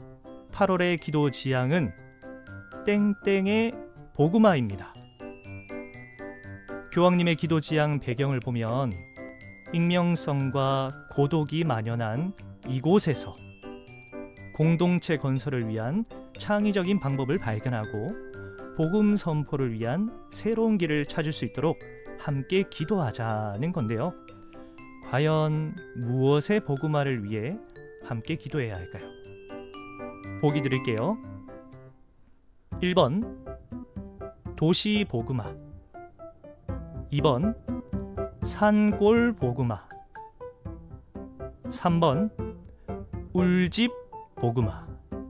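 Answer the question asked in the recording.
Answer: 1번: 도시 복음화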